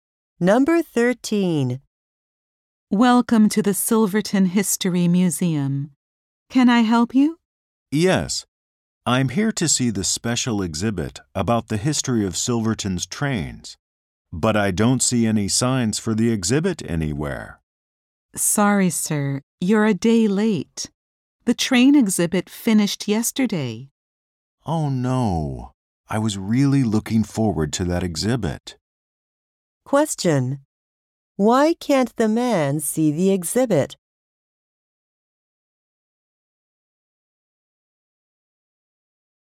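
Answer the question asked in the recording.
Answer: The exhibit finished yesterday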